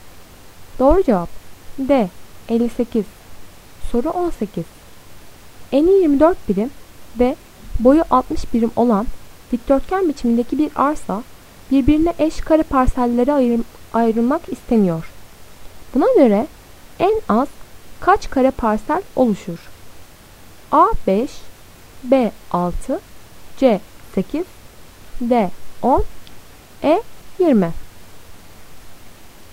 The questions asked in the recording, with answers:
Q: Buna göre en az kaç kare parsel oluşur?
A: Doğru cevap D 10.